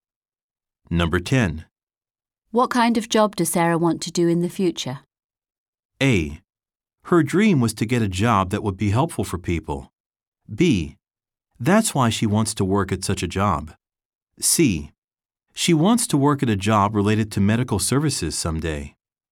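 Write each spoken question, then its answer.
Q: What kind of job does Sarah want to do in the future?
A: C: She wants to work at a job related to medical services someday.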